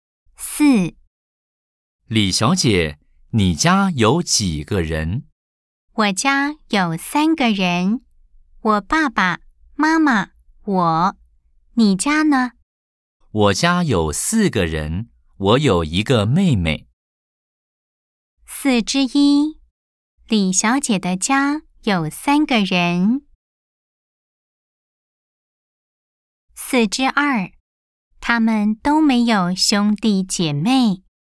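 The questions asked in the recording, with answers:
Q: 李小姐的家有三个人。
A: 对 (O)

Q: 他们都没有兄弟姐妹。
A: 错 (X)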